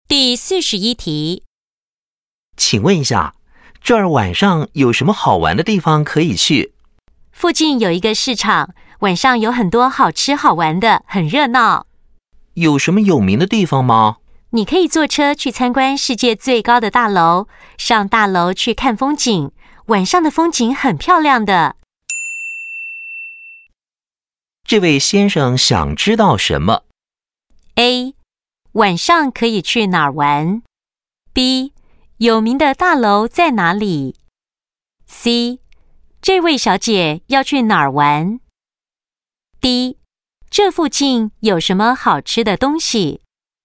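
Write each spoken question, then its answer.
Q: 这位先生想知道什么?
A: A: 晚上可以去哪儿玩?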